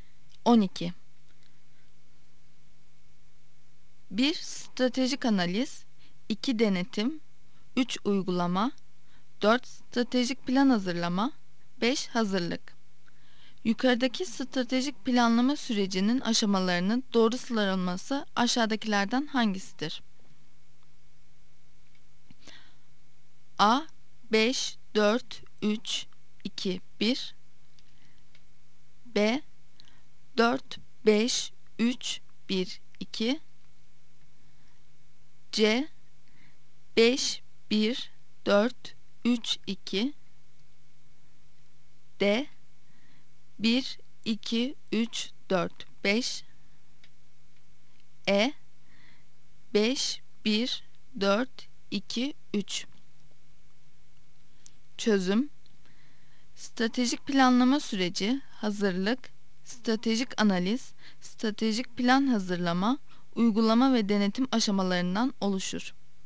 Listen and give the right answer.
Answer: Yanıt C'dir. C, 5, 1, 4, 3, 2.